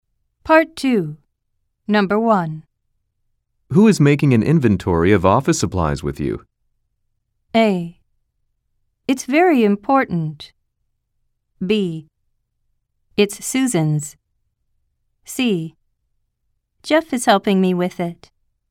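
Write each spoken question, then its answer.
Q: Who is making an inventory of office supplies with you?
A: C: Jeff is helping me with it.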